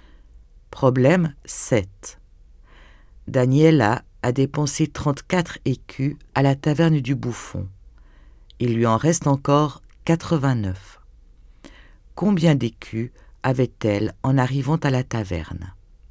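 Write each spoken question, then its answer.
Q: Combien d'écus avait-elle en arrivant à la taverne?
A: 123 écus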